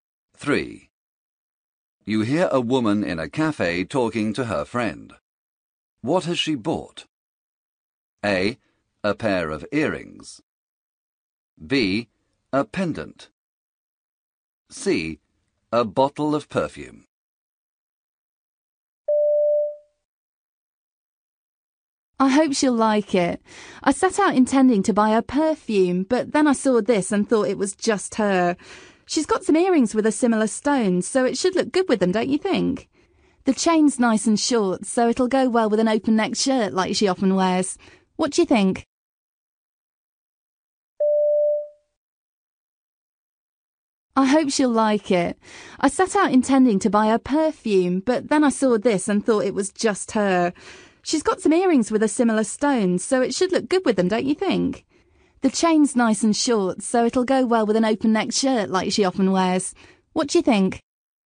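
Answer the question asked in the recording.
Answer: B: A pendant.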